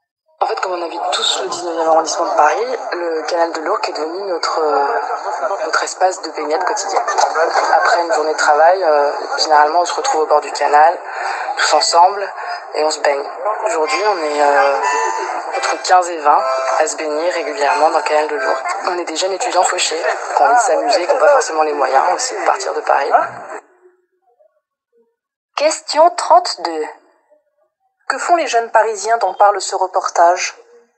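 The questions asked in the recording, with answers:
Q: Que font les jeunes parisiens dont parle ce reportage ?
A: Ils se baignent régulièrement dans le canal de l'Ourcq.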